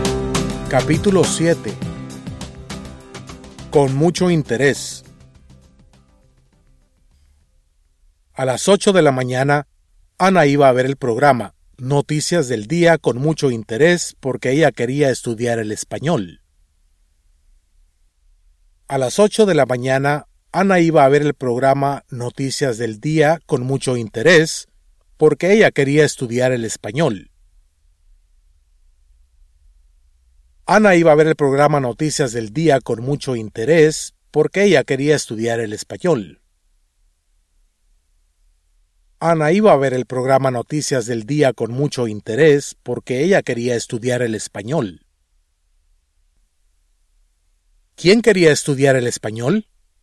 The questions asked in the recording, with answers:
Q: ¿Quién quería estudiar el español?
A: Ana quería estudiar el español.